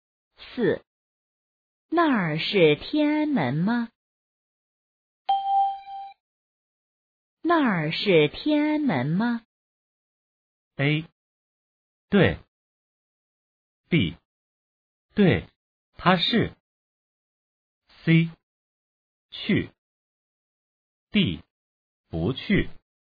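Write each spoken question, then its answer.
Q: 那儿是天安门吗?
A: A: 对。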